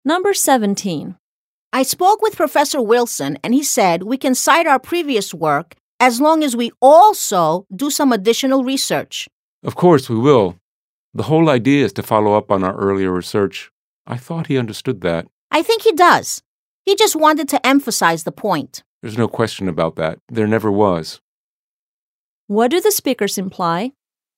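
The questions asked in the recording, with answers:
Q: What do the speakers imply?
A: They had always planned to do additional research to follow up on their earlier work.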